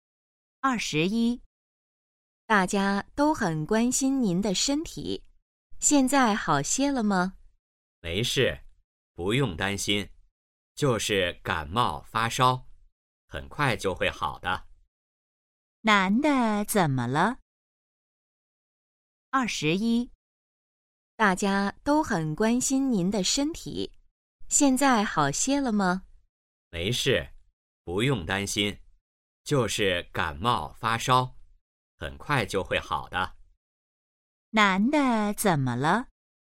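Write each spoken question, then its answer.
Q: 男的怎么了?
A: 感冒发烧了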